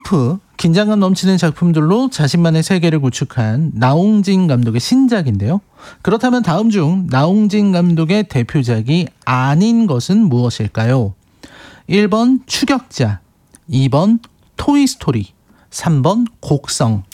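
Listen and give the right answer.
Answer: 2번: 토이스토리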